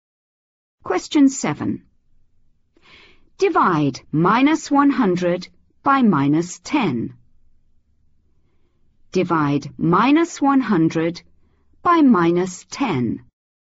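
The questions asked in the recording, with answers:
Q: Divide -100 by -10.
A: 10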